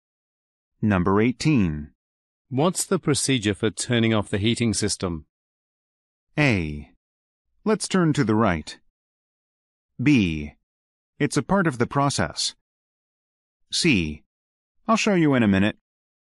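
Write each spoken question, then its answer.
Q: What's the procedure for turning off the heating system?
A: C: I'll show you in a minute.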